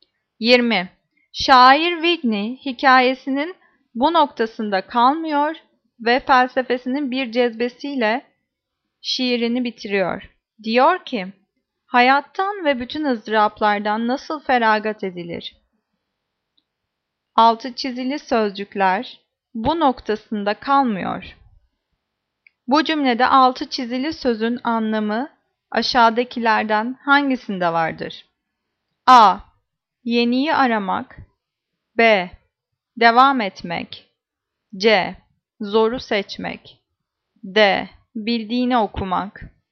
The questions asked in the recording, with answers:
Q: Bu cümlede altı çizili sözün anlamı aşağıdakilerden hangisinde vardır?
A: Cevap B. Devam etmek.